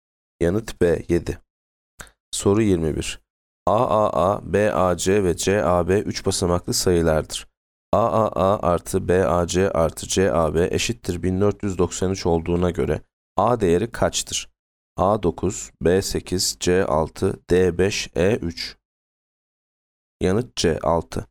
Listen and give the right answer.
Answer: Yanıt C 6.